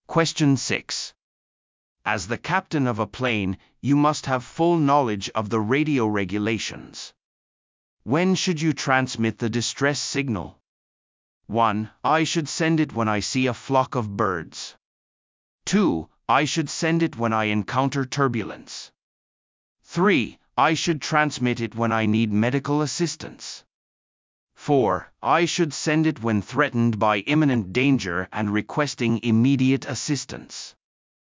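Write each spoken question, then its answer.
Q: When should you transmit the distress signal?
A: 4: I should send it when threatened by imminent danger and requesting immediate assistance.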